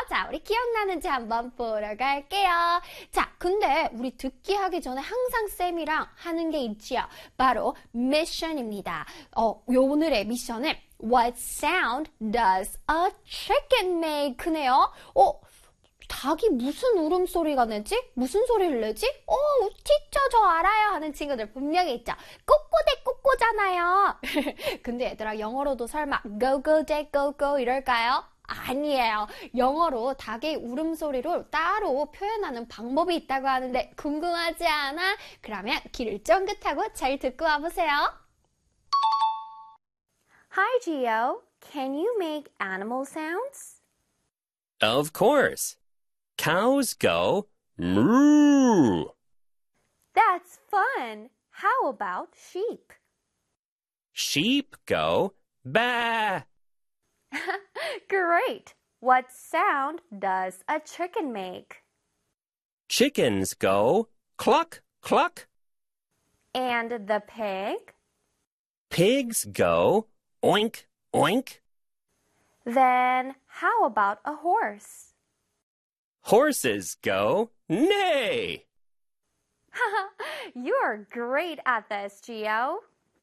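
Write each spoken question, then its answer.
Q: What sound does a chicken make?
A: Chickens go cluck, cluck.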